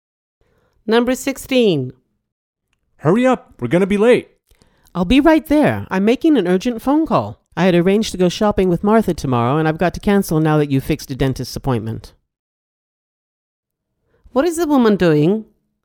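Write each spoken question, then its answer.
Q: What is the woman doing?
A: Making a phone call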